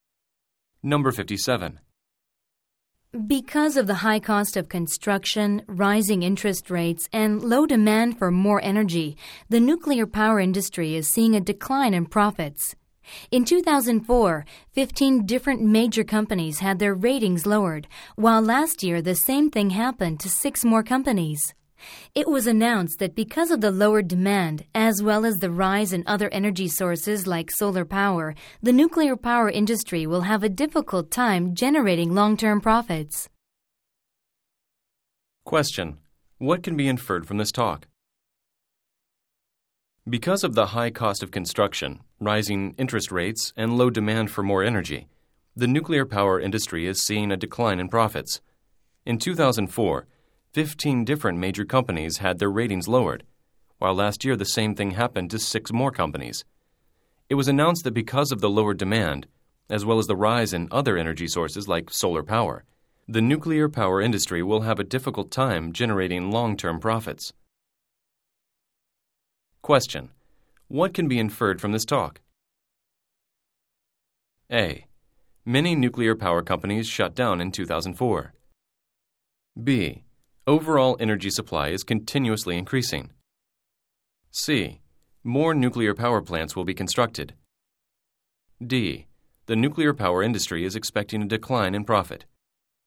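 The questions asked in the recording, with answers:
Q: What can be inferred from this talk?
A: D: The nuclear power industry is expecting a decline in profit.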